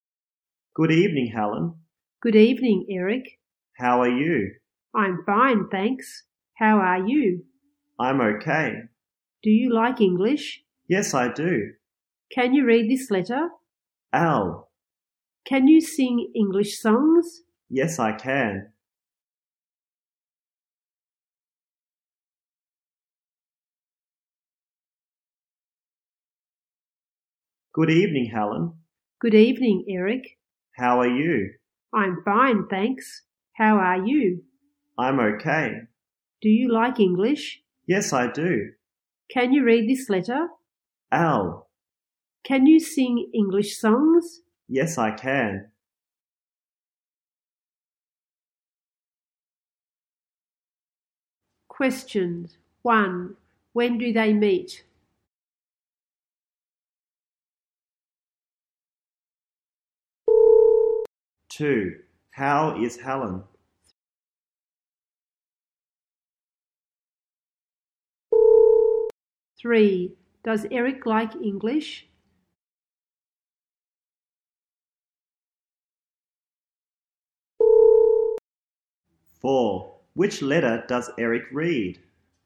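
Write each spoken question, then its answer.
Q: When do they meet?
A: In the evening

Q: How is Helen?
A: She's fine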